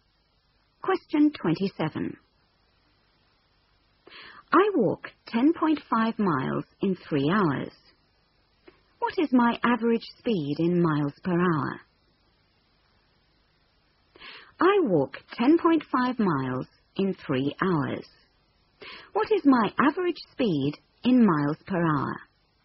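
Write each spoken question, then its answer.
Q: What is my average speed in miles per hour?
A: 3.5 mph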